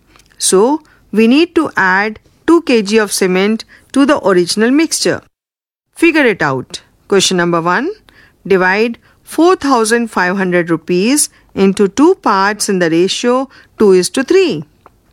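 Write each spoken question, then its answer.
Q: Divide 4,500 rupees into 2 parts in the ratio 2 is to 3.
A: 1,800 rupees and 2,700 rupees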